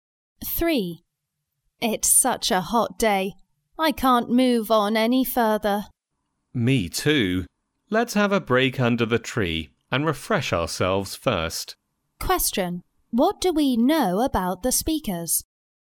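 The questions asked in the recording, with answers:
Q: What do we know about the speakers?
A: They are tired from the heat and will rest under a tree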